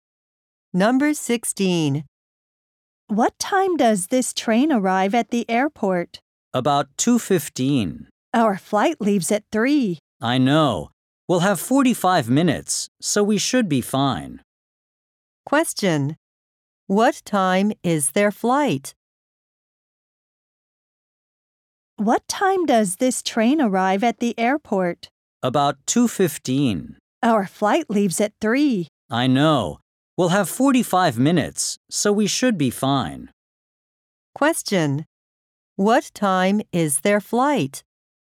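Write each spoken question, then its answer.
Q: What time is their flight?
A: At 3:00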